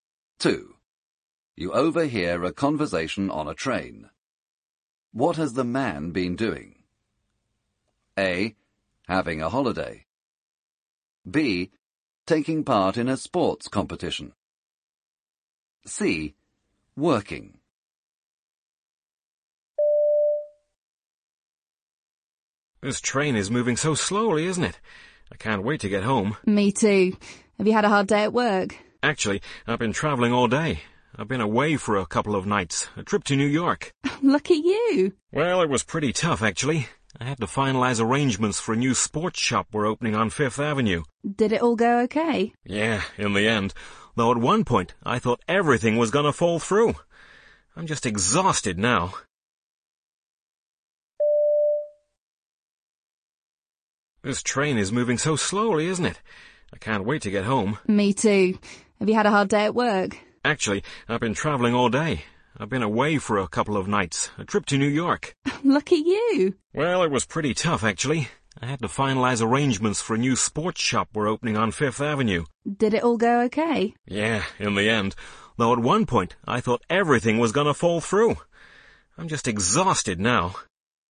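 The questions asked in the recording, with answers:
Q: What has the man been doing?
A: C: Working.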